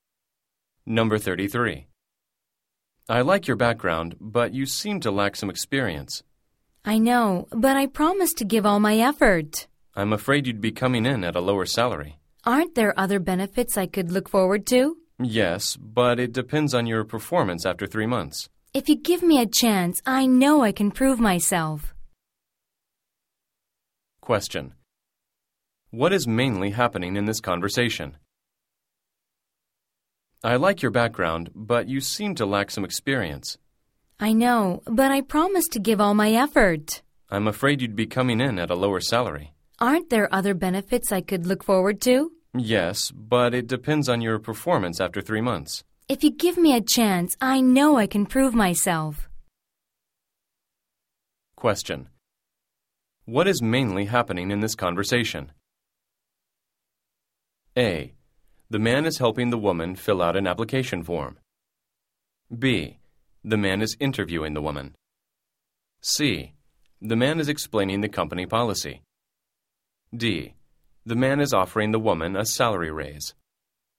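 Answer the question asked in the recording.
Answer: B: The man is interviewing the woman.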